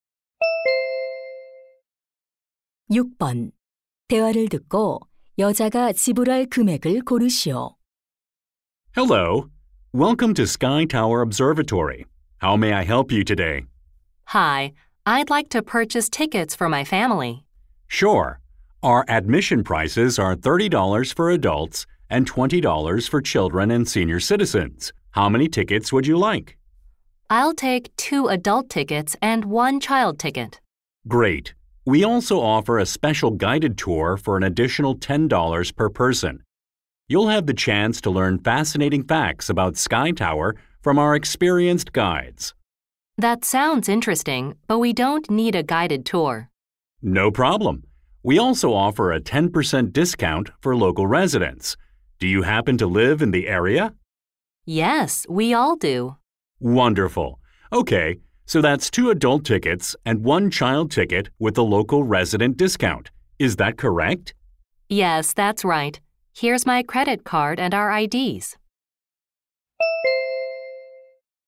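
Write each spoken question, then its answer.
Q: 대화를 듣고 여자가 지불할 금액을 고르시오.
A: $72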